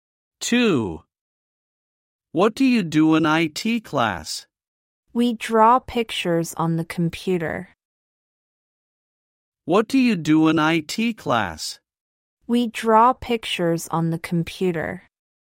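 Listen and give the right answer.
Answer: They draw pictures on the computer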